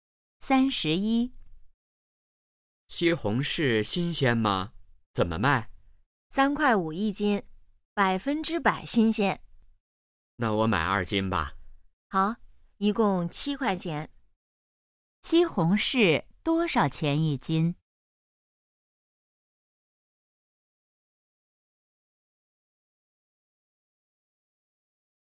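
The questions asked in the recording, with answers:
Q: 西红柿多少钱一斤?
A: 三块五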